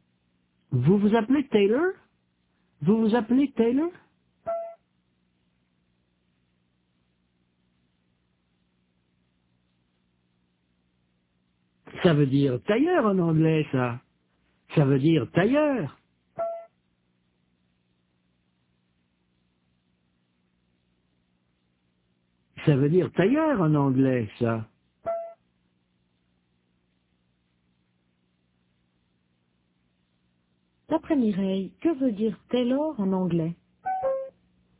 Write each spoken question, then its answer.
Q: D'après Mireille, que veut dire Taylor en anglais?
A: Tailleur, ça veut dire tailleur.